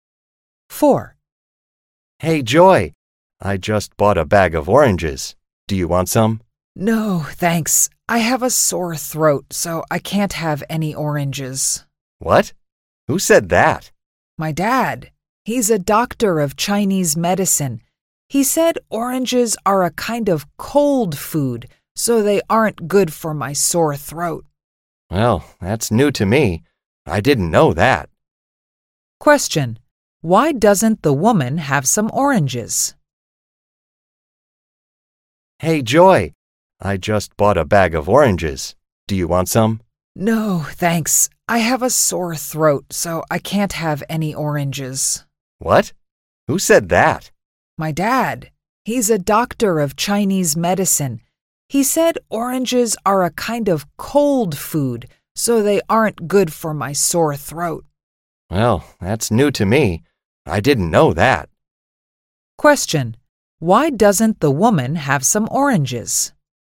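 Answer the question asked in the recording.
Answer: She has a sore throat, and oranges are a cold food that is bad for it.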